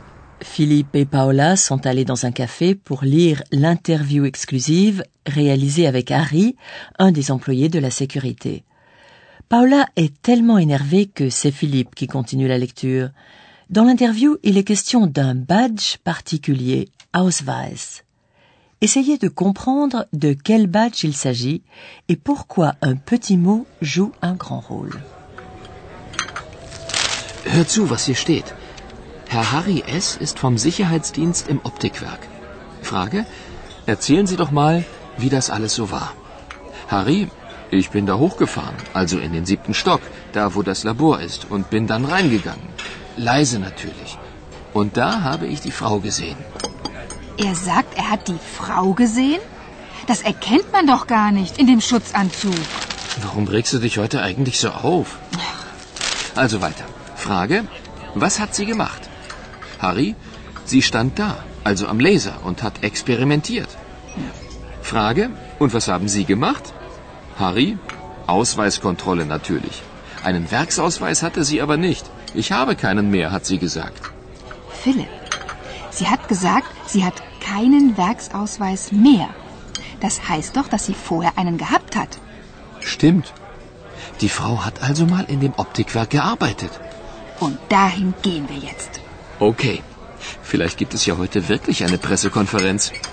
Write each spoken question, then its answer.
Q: Essayez de comprendre de quel badge il s'agit et pourquoi un petit mot joue un grand rôle.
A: Avez-vous entendu le mot composé Werksausweis qui signifie badge d'usine